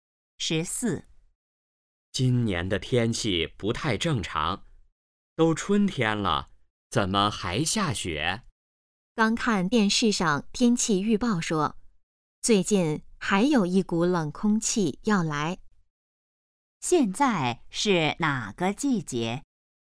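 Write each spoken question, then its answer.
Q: 现在是哪个季节?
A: 春天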